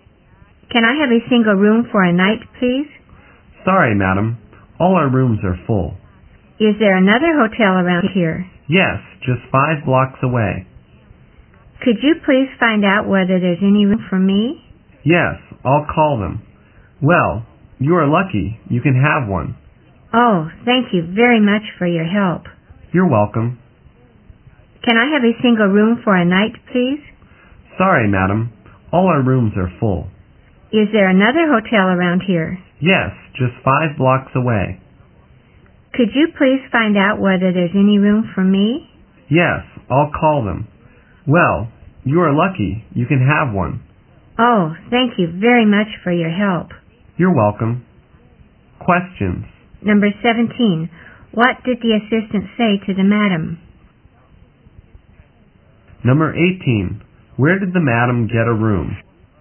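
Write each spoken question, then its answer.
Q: What did the assistant say to the madam?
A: All their rooms were full

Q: Where did the madam get a room?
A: At another hotel 5 blocks away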